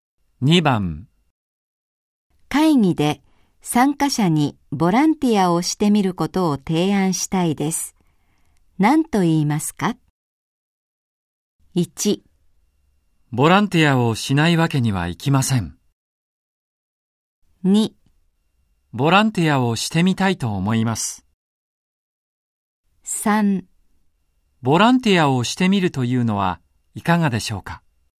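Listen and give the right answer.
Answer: 3: ボランティアをしてみるというのはいかがでしょうか。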